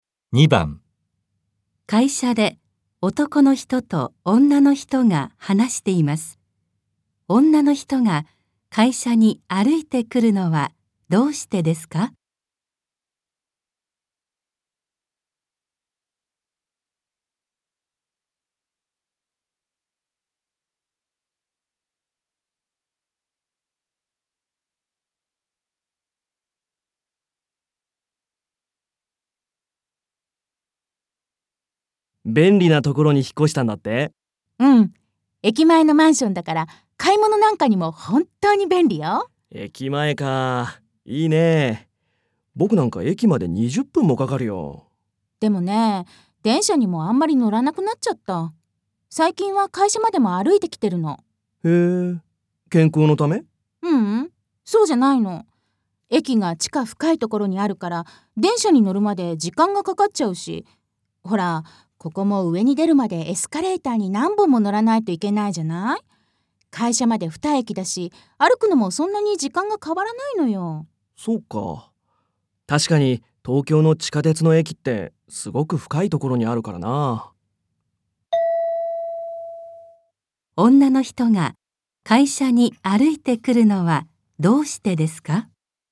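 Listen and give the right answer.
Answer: 駅が地下深くて電車に乗るまで時間がかかり、歩いても時間があまり変わらないから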